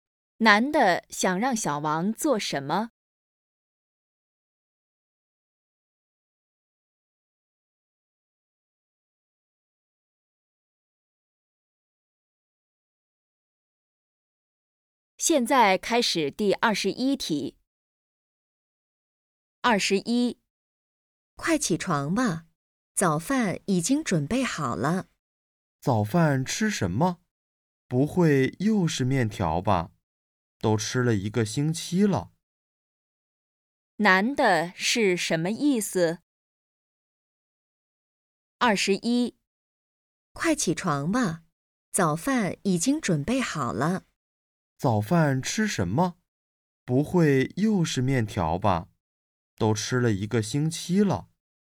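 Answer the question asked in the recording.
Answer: 不想再吃面条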